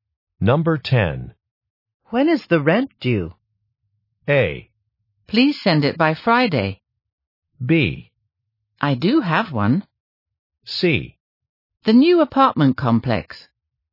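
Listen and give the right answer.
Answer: A: Please send it by Friday.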